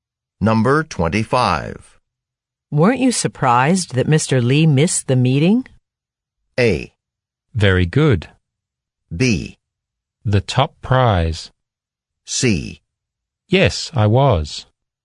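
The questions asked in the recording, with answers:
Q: Weren't you surprised that Mr. Lee missed the meeting?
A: C: Yes, I was.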